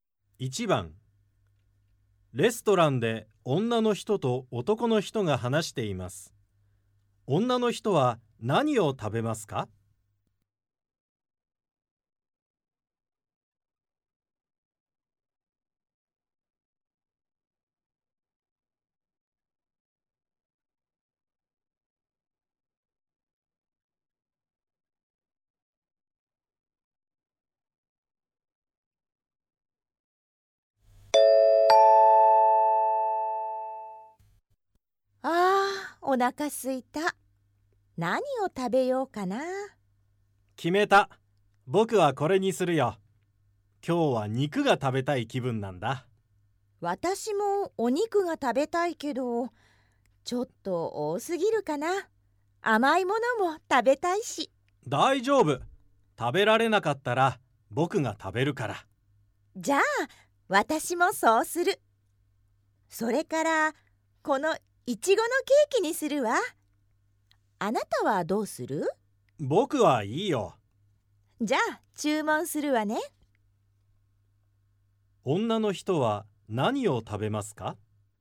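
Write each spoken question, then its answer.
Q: 女の人は何を食べますか?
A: 男の人と同じ肉料理といちごのケーキ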